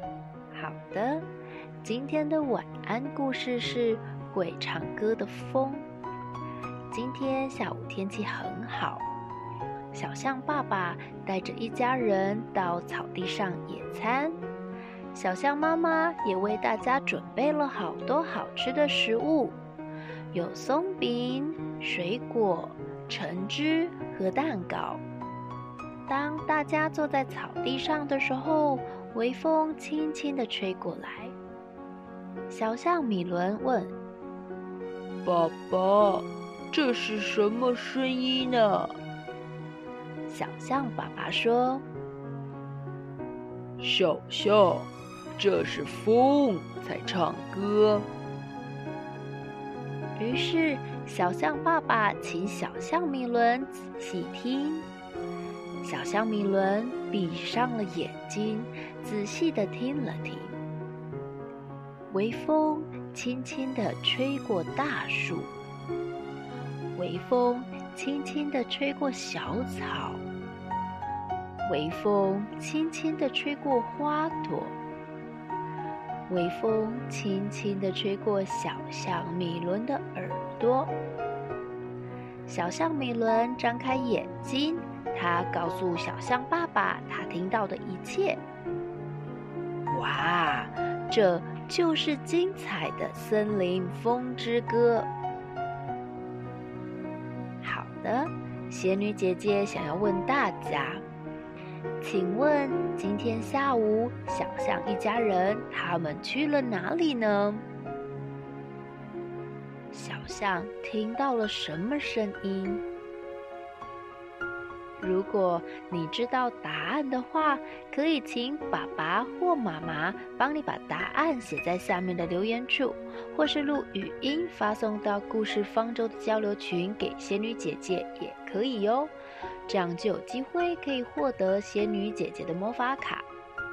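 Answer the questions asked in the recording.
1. 到草地上野餐
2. 风在唱歌的声音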